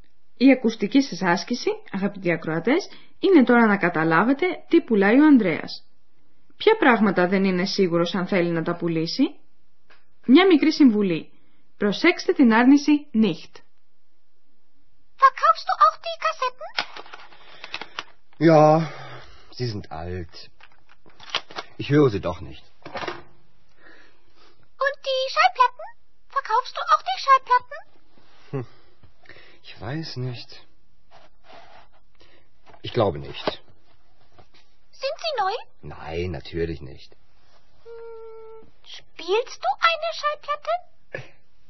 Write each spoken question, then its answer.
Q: Η ακουστική σας άσκηση, αγαπητοί ακροατές, είναι τώρα να καταλάβετε τι πουλάει ο Ανδρέας.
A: θέλει να πουλήσει τις κασέτες.

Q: Ποια πράγματα δεν είναι σίγουρος αν θέλει να τα πουλήσει.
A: Όσο για τους δίσκους, δεν ξέρει και ο ίδιος τι να κάνει.